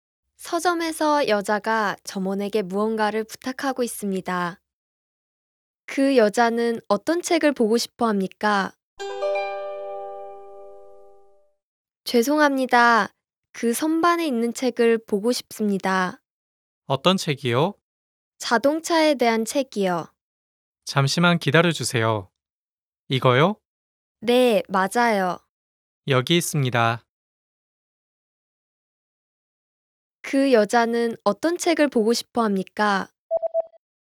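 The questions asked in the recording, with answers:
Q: 그 여자는 어떤 책을 보고 싶어 합니까?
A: 자동차에 대한 책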